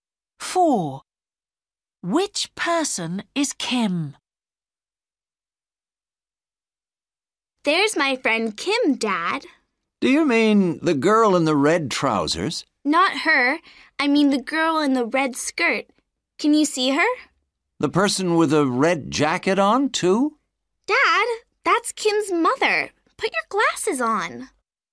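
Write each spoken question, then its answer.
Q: Which person is Kim?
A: the girl in the red skirt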